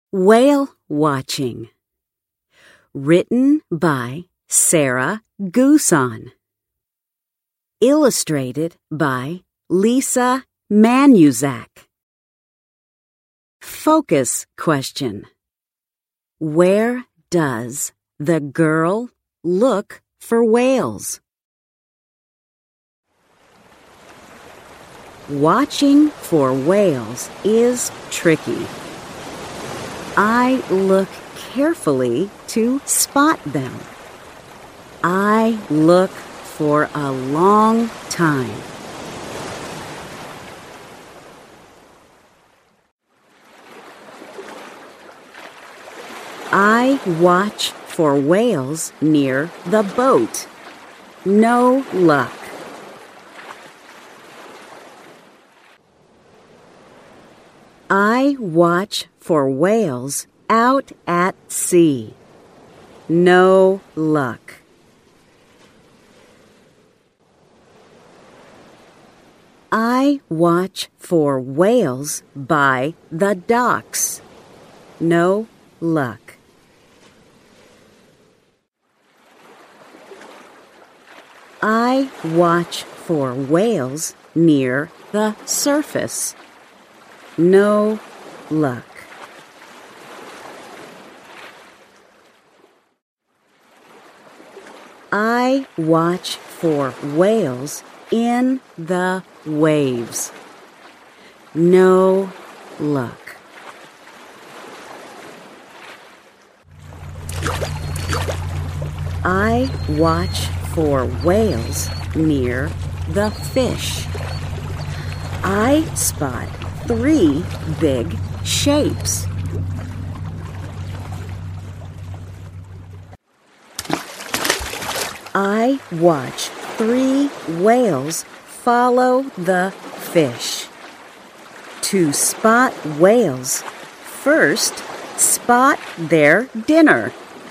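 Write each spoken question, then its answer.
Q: Where does the girl look for whales?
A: Near the boat, out at sea, by the docks, near the surface, in the waves, and near the fish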